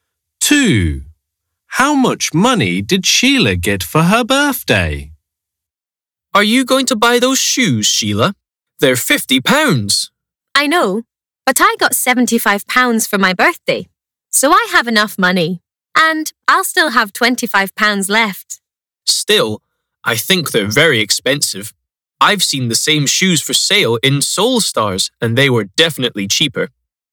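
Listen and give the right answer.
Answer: £75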